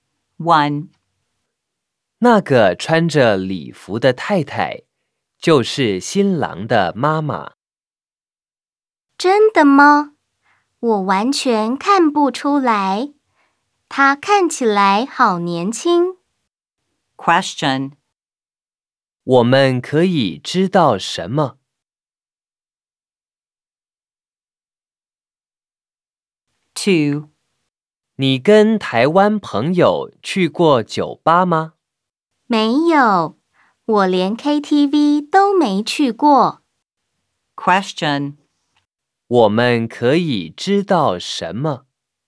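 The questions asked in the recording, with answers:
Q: 我们可以知道什么?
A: 新郎的妈妈看起来很年轻

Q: 我们可以知道什么?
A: 他没跟台湾朋友去过酒吧,连KTV都没去过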